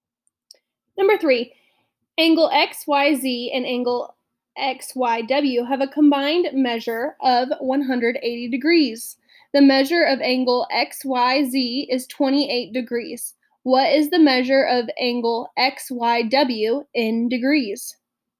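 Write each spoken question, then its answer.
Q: What is the measure of angle XYW in degrees?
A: 152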